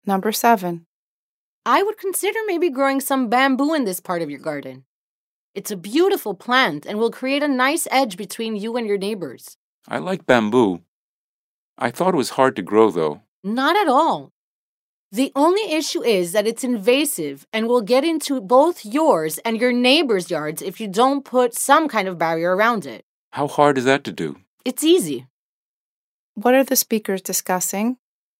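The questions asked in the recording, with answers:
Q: What are the speakers discussing?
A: Growing bamboo in the garden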